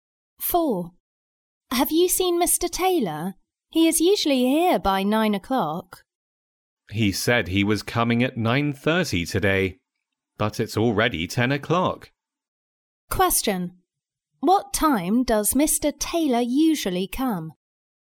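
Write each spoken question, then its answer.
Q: What time does Mr. Taylor usually come?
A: By 9 o'clock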